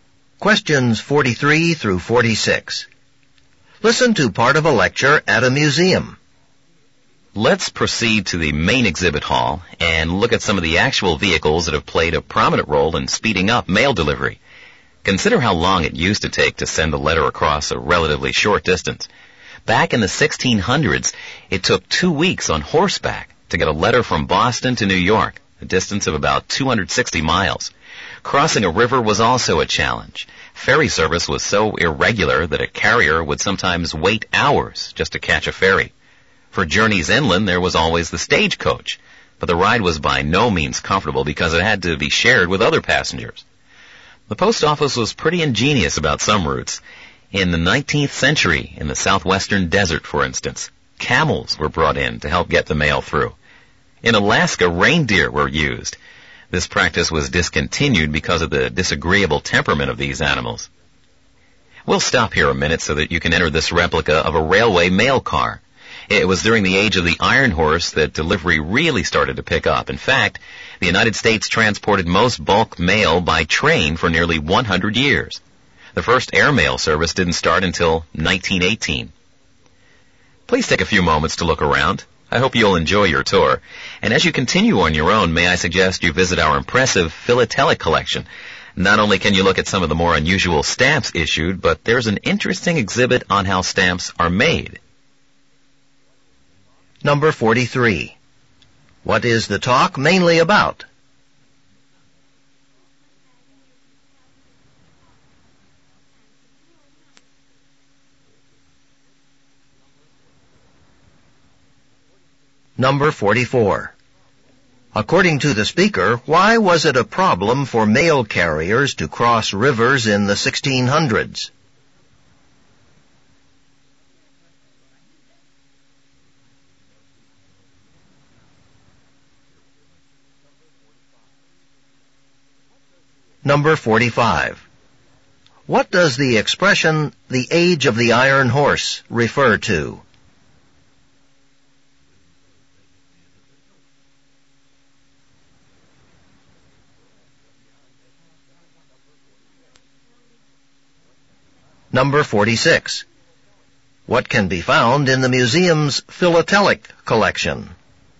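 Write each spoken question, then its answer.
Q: What is the talk mainly about?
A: The history of mail delivery methods

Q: According to the speaker, why was it a problem for mail carriers to cross rivers in the 1600s?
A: Ferry service was irregular, so carriers sometimes waited hours

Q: What does the expression, the age of the iron horse, refer to?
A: The era of railroads/trains

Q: What can be found in the museum's philatelic collection?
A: Unusual stamps and an exhibit on how stamps are made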